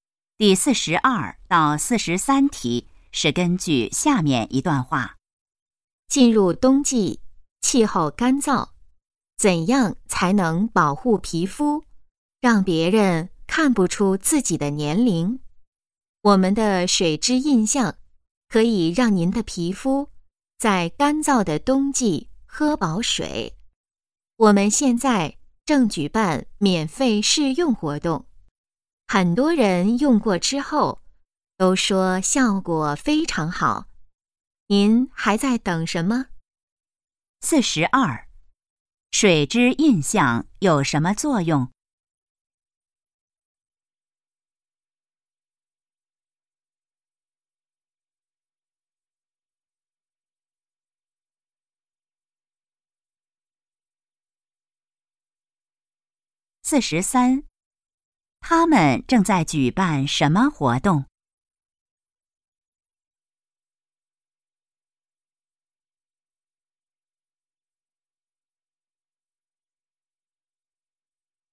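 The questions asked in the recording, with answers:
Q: 水质印象有什么作用?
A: 给皮肤补水

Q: 他们正在举办什么活动?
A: 免费试用活动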